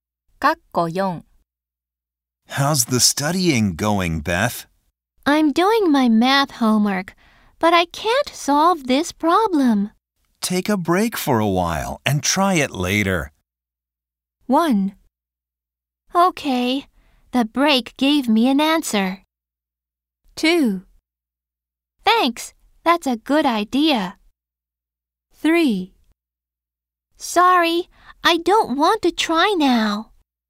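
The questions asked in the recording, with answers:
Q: Take a break for a while and try it later.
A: 2: Thanks, that's a good idea.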